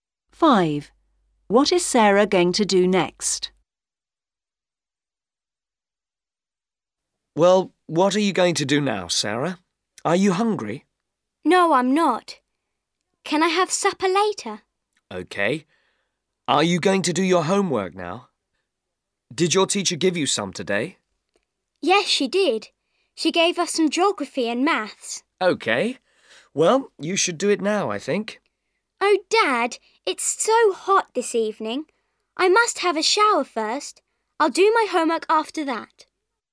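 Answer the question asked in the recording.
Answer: Have a shower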